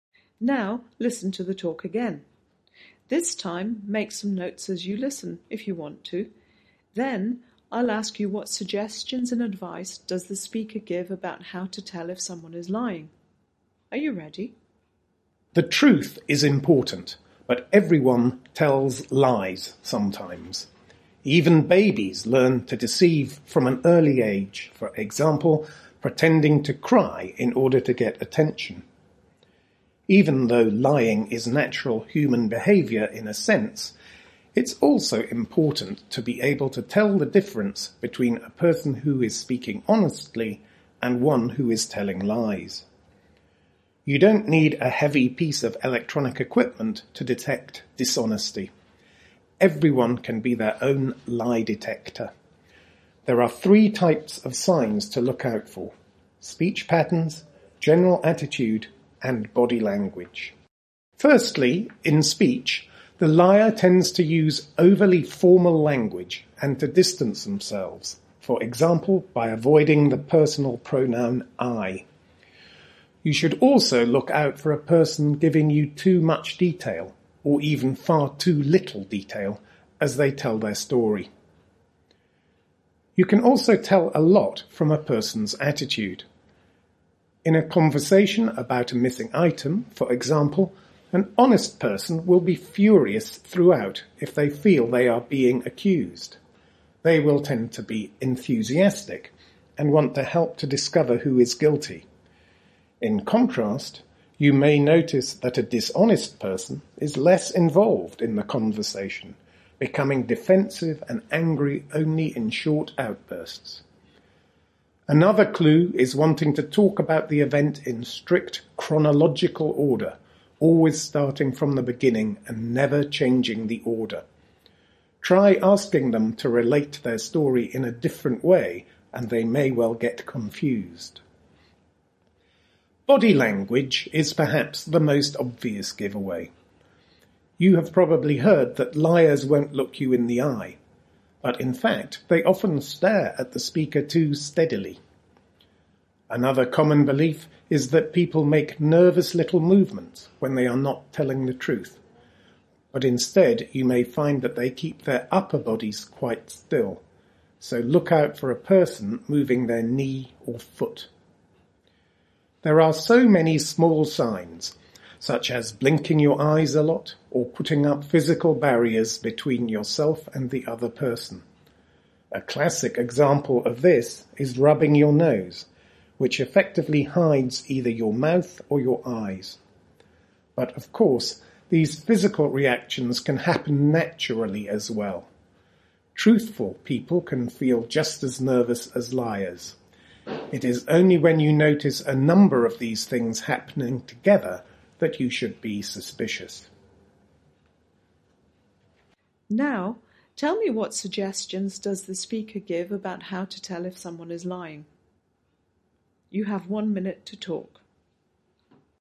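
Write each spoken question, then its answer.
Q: Now, tell me, what suggestions does the speaker give about how to tell if someone is lying?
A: Look at speech (too formal, avoiding 'I', too much or too little detail), attitude (less involved, short angry outbursts, telling events in strict order and getting confused when asked to change it) and body language (staring too steadily, still upper body but moving knee or foot, blinking, barriers such as rubbing the nose); be suspicious only when several signs appear together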